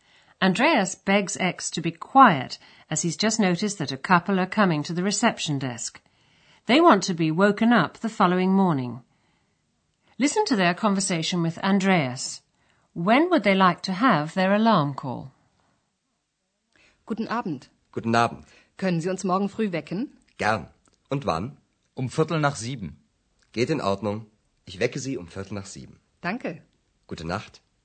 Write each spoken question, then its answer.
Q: When would they like to have their alarm call?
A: Then they say they'd like to be woken at 7:15.